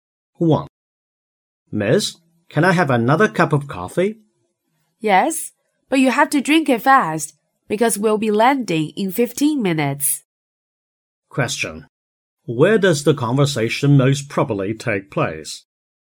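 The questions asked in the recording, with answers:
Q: Where does the conversation most probably take place?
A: On a plane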